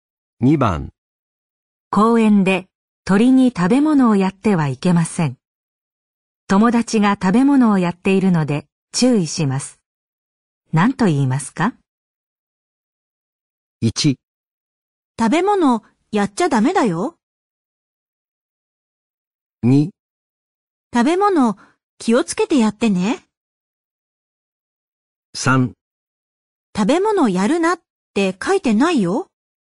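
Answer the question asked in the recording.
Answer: 1: 食べ物やっちゃダメだよ。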